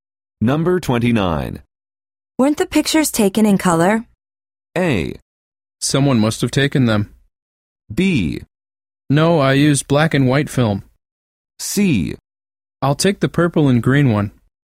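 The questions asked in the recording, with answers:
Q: Weren't the pictures taken in color?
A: B: No, I used black and white film.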